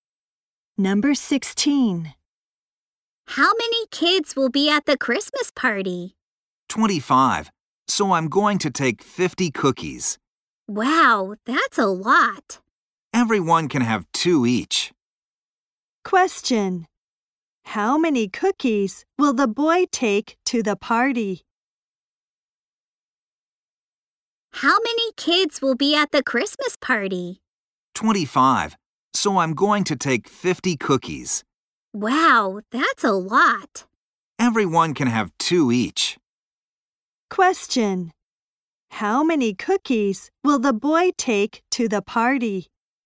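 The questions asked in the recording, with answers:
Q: How many cookies will the boy take to the party?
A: 50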